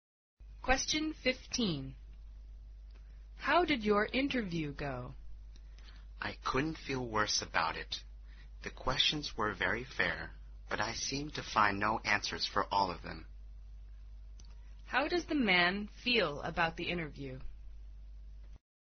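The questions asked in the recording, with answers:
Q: How does the man feel about the interview?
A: Very bad; he couldn't answer the questions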